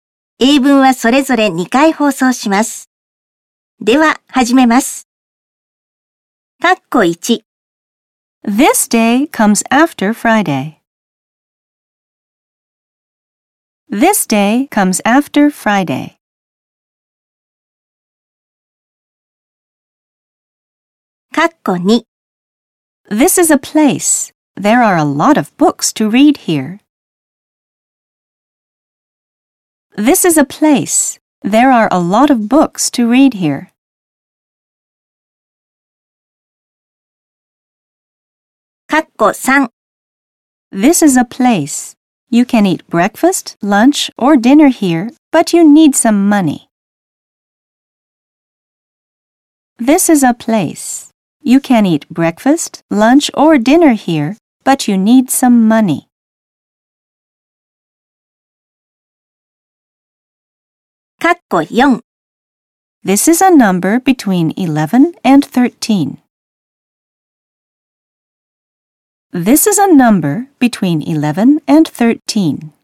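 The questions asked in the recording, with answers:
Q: This day comes after Friday.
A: Saturday

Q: This is a place. There are a lot of books to read here.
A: library

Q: This is a place. You can eat breakfast, lunch, or dinner here, but you need some money.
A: restaurant

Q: This is a number between 11 and 13.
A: twelve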